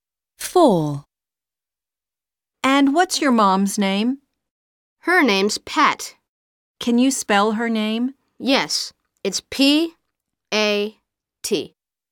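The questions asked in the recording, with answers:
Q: And what's your mom's name?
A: Pat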